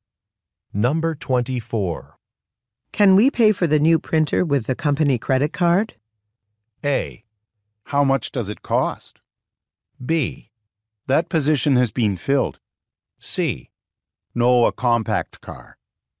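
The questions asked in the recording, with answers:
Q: Can we pay for the new printer with the company credit card?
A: A: How much does it cost?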